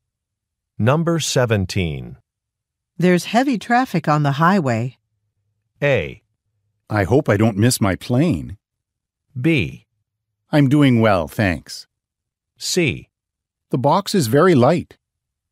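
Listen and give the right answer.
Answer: A: I hope I don't miss my plane.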